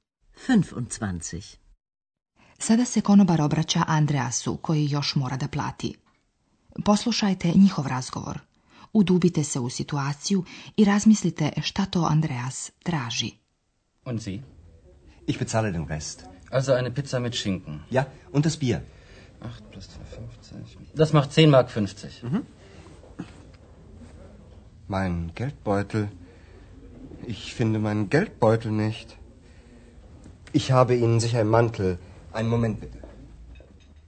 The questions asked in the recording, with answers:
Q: Udubite se u situaciju i razmislite šta to Andreas traži.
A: Da bi se platio račun, potreban je novac, a on se nalazi u novčaniku.